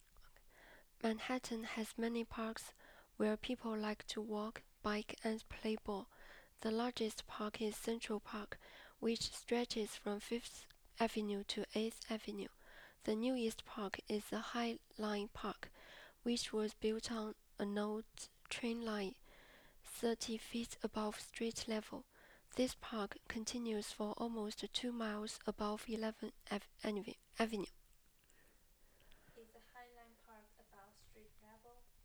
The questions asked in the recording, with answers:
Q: Is the High Line Park above street level?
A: Yes, it is above high, it is 30 feet above line level.